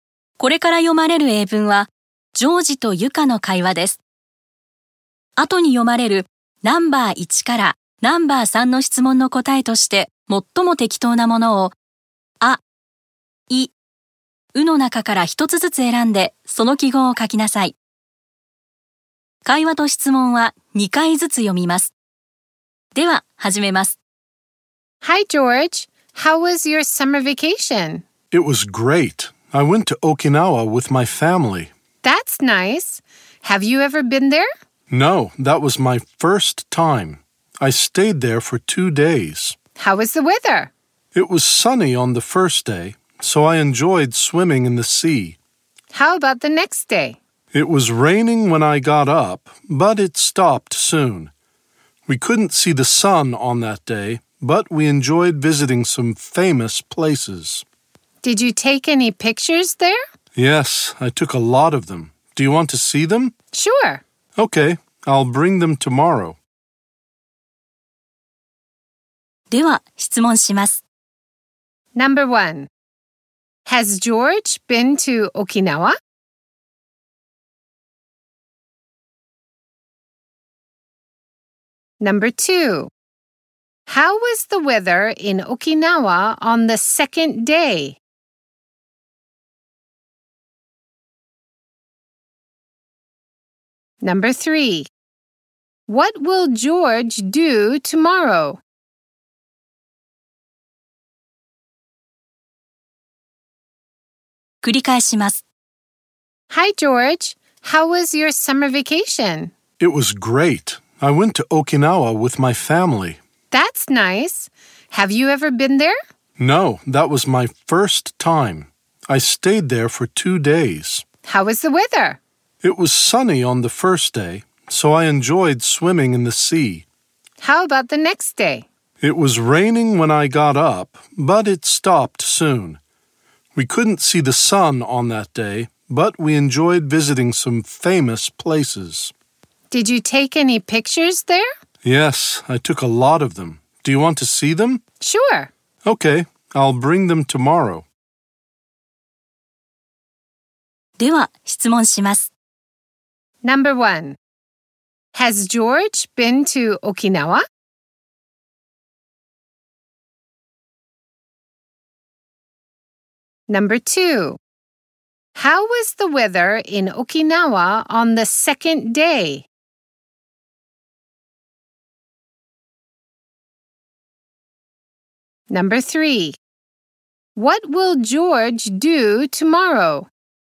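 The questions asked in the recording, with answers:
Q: How was the weather in Okinawa on the second day?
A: It was rainy in the morning, then cloudy.

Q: What will George do tomorrow?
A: He will bring his pictures of Okinawa.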